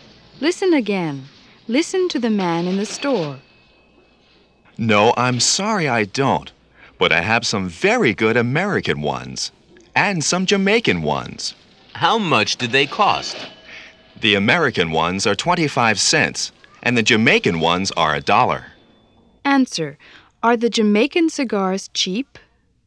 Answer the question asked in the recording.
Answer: No, they're not.